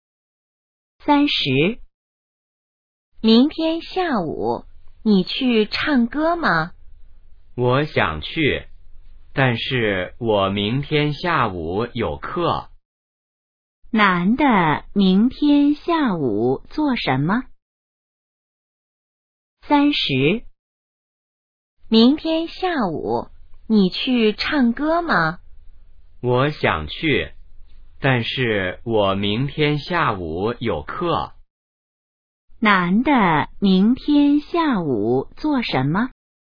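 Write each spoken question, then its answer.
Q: 男的明天下午做什么?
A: 上课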